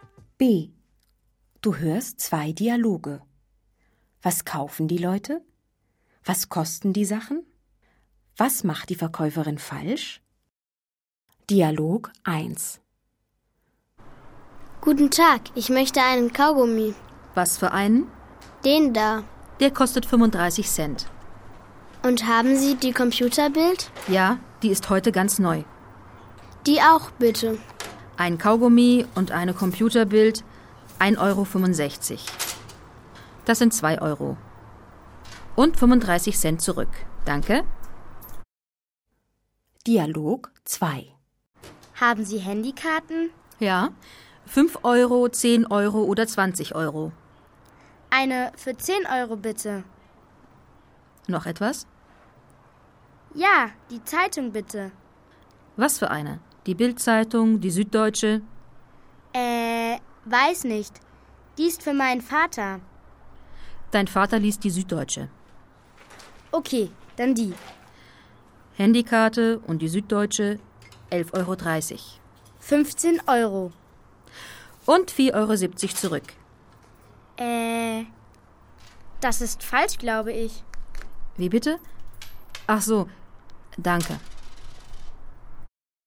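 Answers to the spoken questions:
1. Dialog 1: einen Kaugummi und die Computerbild; Dialog 2: eine Handykarte für 10 Euro und die Süddeutsche
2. Dialog 1: 1,65 Euro (Kaugummi 35 Cent); Dialog 2: 11,30 Euro (Handykarte 10 Euro)
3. Sie gibt in Dialog 2 4,70 Euro zurück statt 3,70 Euro.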